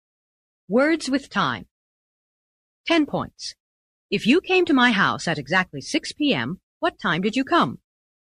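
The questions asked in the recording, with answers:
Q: If you came to my house at exactly 6 p.m., what time did you come?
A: six o'clock on the dot (sharp)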